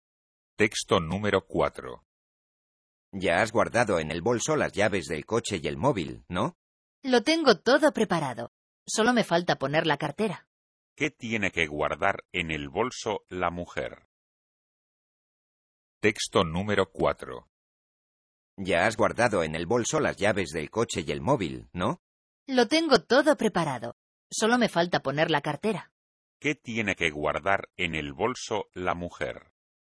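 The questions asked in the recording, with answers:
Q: ¿Qué tiene que guardar en el bolso la mujer?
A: La cartera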